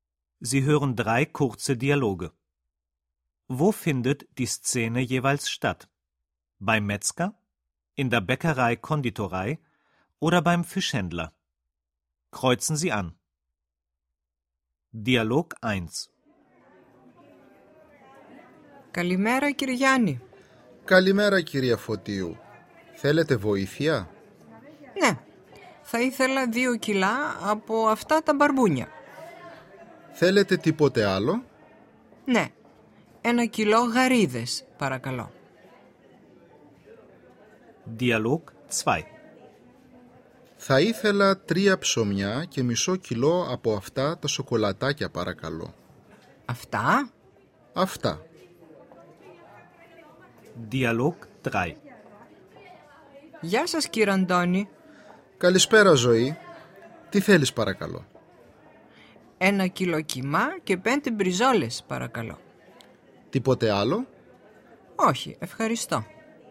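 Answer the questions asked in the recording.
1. Beim Fischhändler
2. In der Bäckerei-Konditorei
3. Beim Metzger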